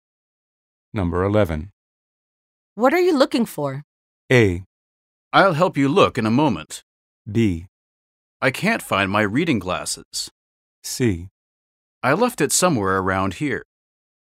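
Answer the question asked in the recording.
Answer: B: I can't find my reading glasses.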